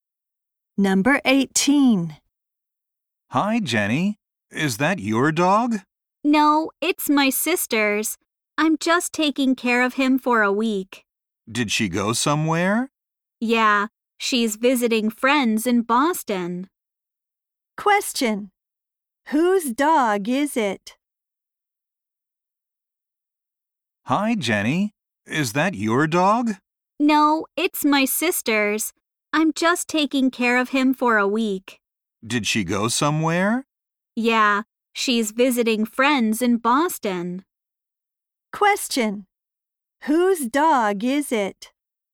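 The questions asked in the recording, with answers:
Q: Whose dog is it?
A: Jenny's sister's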